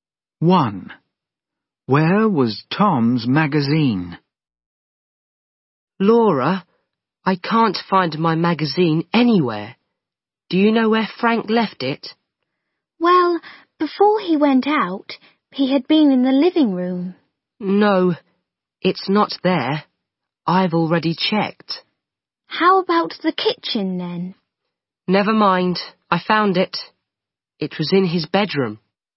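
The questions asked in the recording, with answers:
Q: Where was Tom's magazine?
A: In his bedroom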